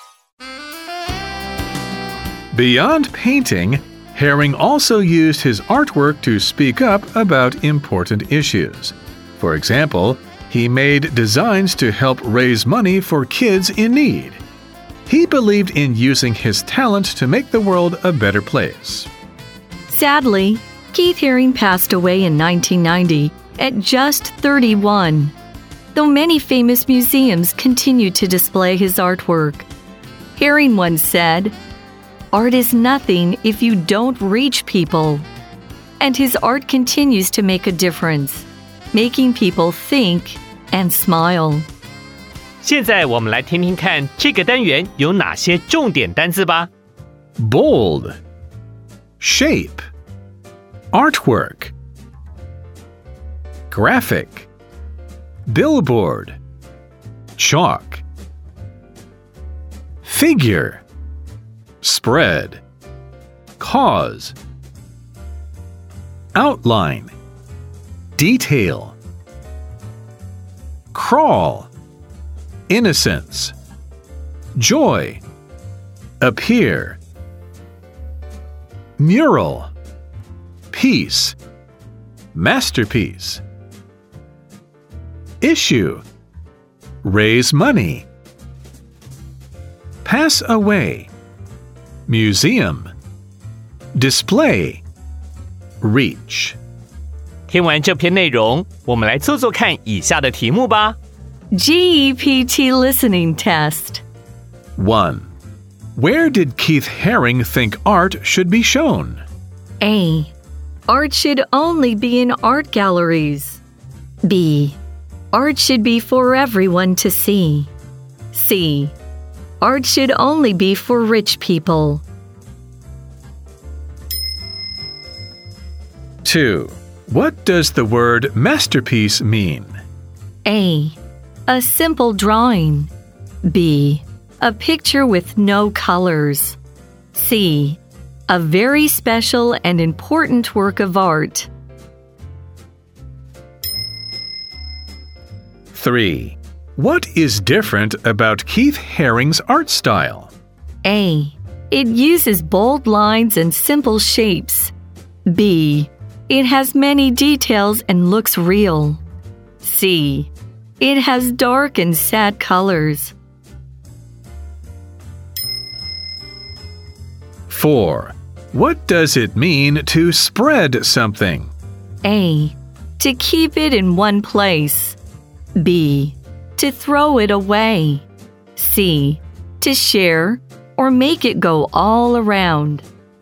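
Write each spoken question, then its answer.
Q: Where did Keith Haring think art should be shown?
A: B: Art should be for everyone to see.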